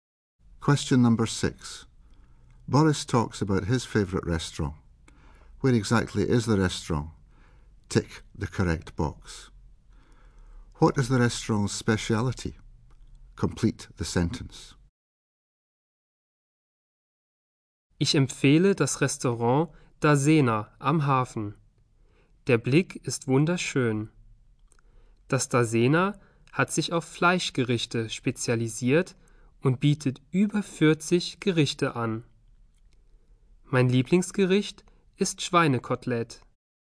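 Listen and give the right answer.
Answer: Meat dishes (over 40 dishes)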